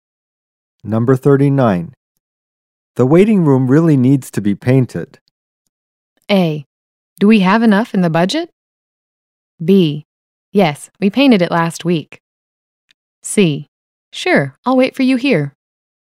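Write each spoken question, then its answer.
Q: The waiting room really needs to be painted.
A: A: Do we have enough in the budget?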